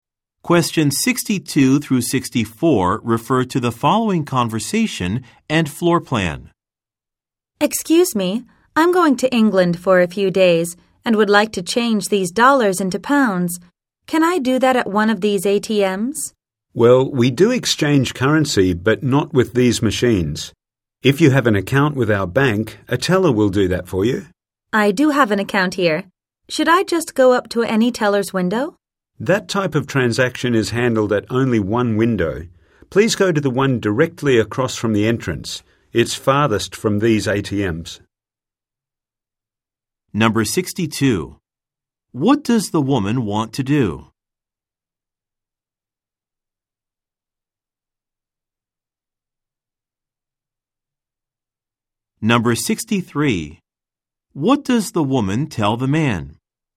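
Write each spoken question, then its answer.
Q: What does the woman want to do?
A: Change dollars into pounds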